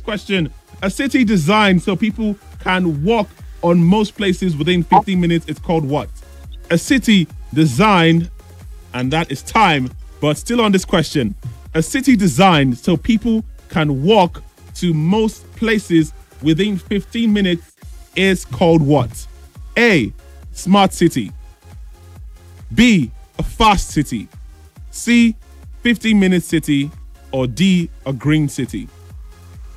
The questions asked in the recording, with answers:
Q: A city designed so people can walk to most places within 15 minutes is called what?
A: It's called a 15-minute city.